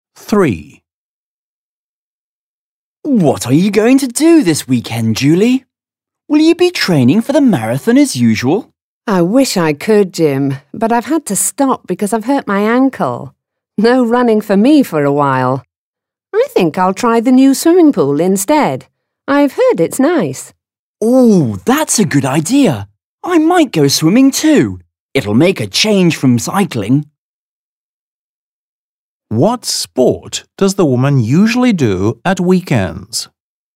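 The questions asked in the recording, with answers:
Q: What sport does the woman usually do at weekends?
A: Running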